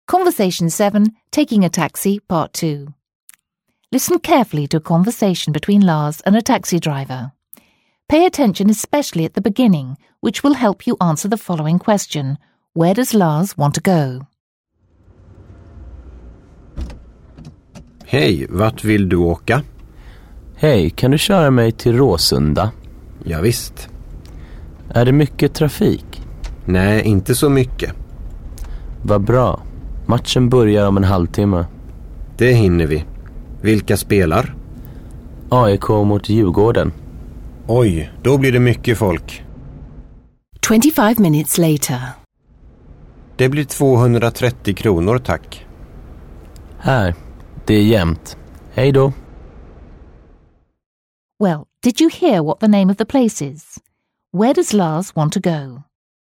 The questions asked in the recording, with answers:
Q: Where does Lars want to go?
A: Lars wants to go to Råsunda, a big football stadium in the north of Stockholm.